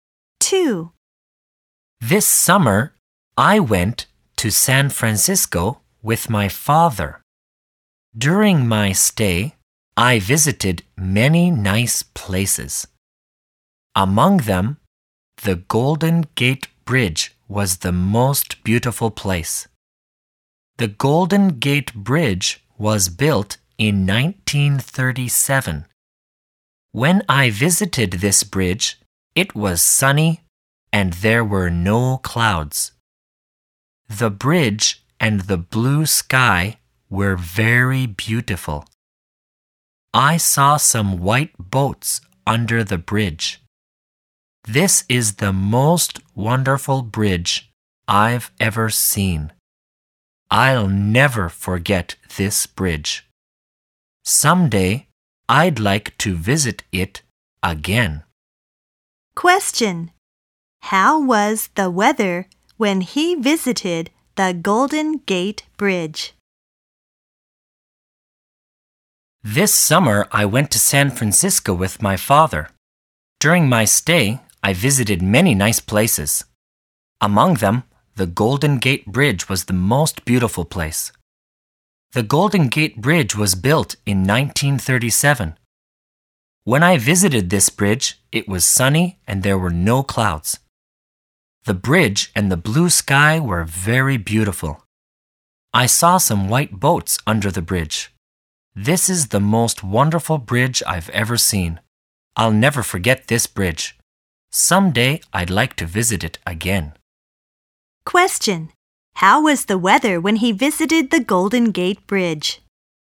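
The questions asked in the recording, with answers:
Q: How was the weather when he visited the Golden Gate Bridge?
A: It was sunny with no clouds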